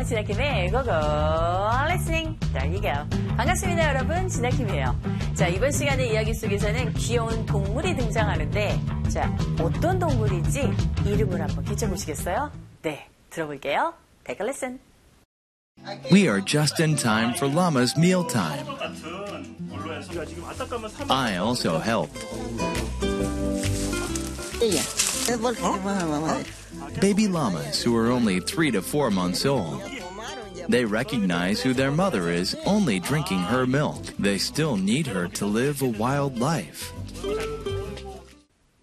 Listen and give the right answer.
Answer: 네, 귀여운 야마라 불리는 라마라는 동물입니다.